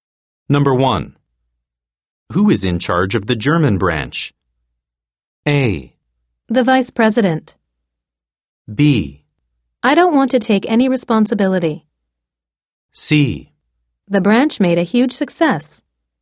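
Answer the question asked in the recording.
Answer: A: The Vice President.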